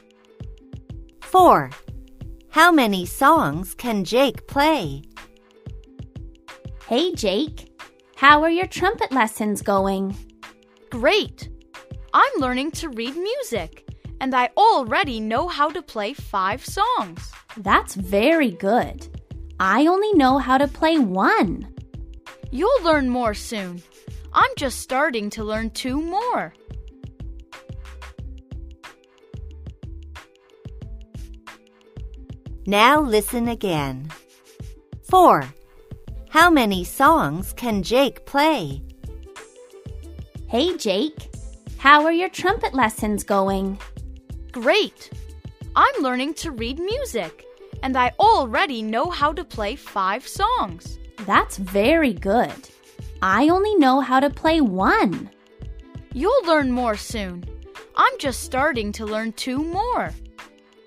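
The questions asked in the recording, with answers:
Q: How many songs can Jake play?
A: five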